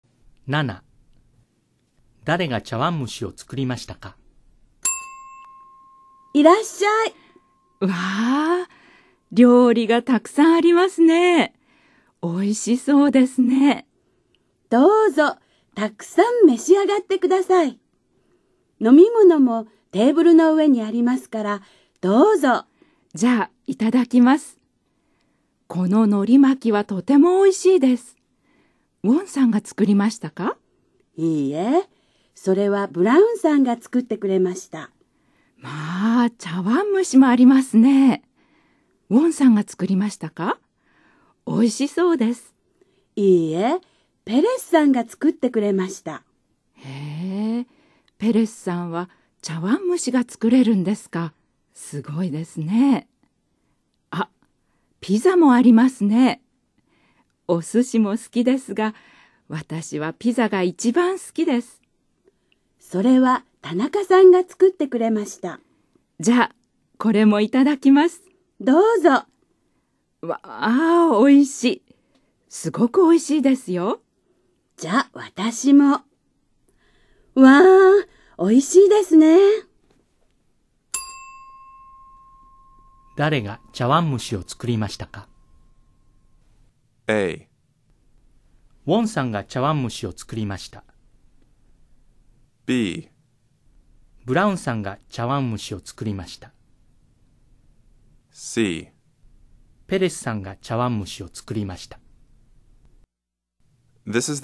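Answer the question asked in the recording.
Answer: C: ペレスさんが茶碗蒸しを作りました。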